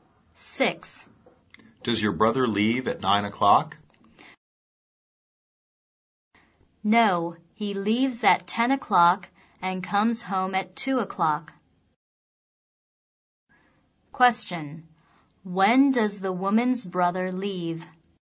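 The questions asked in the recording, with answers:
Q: When does the woman's brother leave?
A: At 10 o'clock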